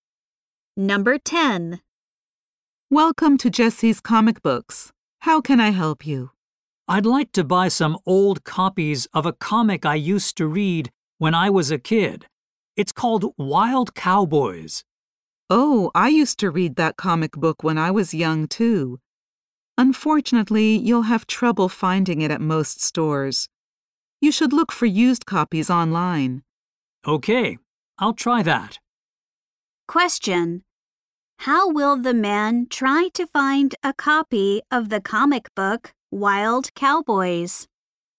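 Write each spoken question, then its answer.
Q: How will the man try to find a copy of the comic book Wild Cowboys?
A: By looking for used copies online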